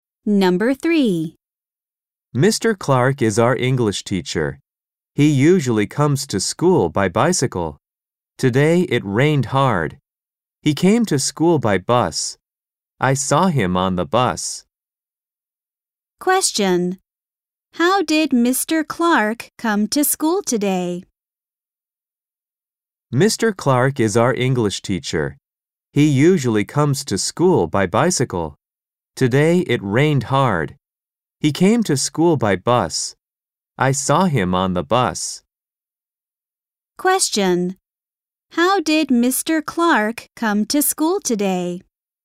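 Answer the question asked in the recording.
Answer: By bus.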